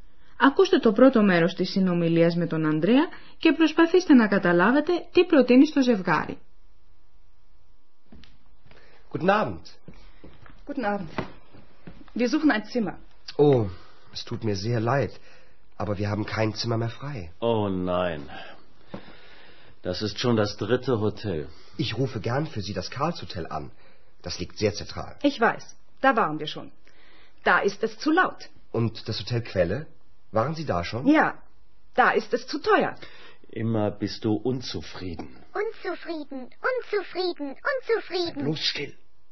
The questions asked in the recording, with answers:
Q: Ακούστε το πρώτο μέρος της συνομιλίας με τον Ανδρέα και προσπαθήστε να καταλάβετε τι προτείνει στο ζευγάρι.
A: Ο Ανδρέας τους προτείνει να τηλεφωνήσει σε άλλο ξενοδοχείο.